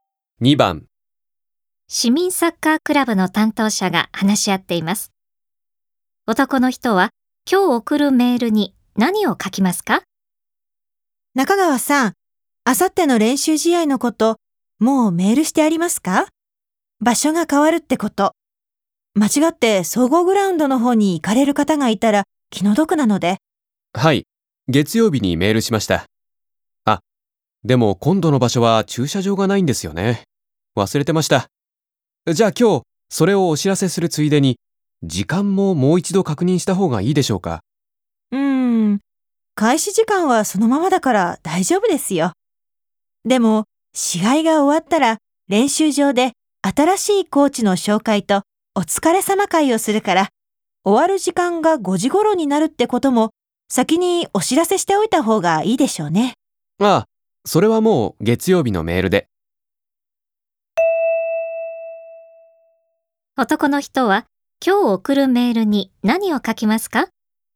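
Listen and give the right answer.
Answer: 今度の場所には駐車場がないこと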